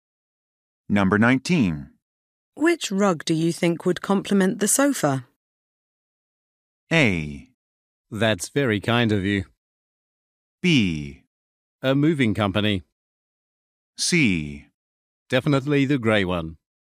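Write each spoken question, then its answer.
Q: Which rug do you think would complement the sofa?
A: C: Definitely the grey one.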